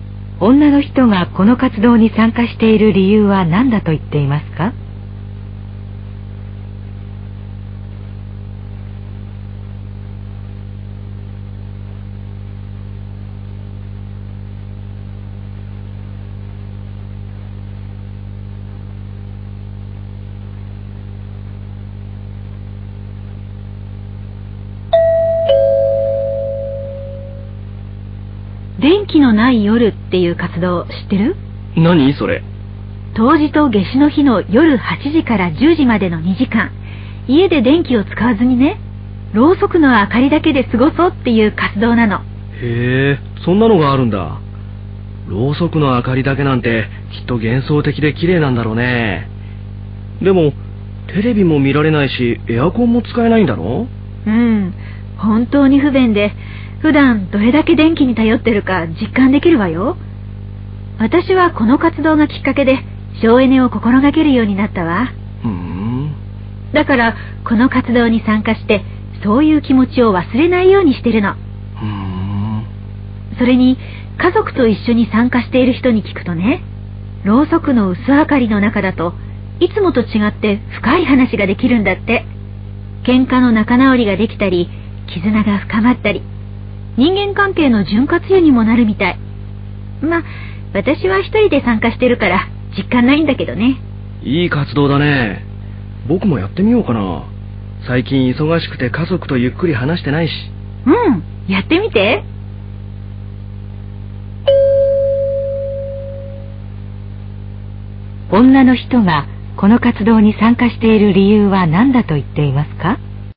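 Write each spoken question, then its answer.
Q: 女の人がこの活動に参加している理由は何だと言っていますか?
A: 省エネを心がける気持ちを忘れないようにするため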